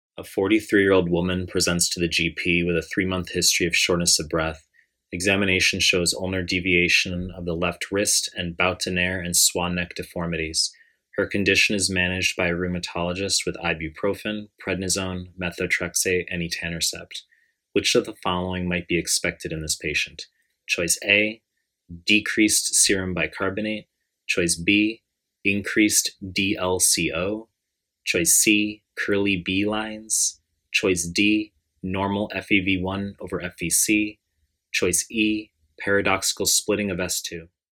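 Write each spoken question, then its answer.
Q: Which of the following might be expected in this patient?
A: D: normal FEV1 over FVC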